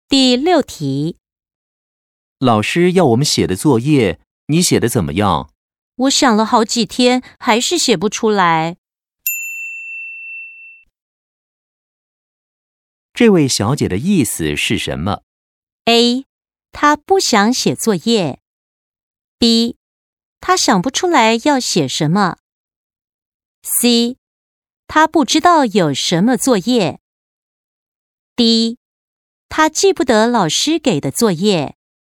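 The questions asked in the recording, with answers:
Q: 这位小姐的意思是什么?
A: B: 她想不出来要写什么。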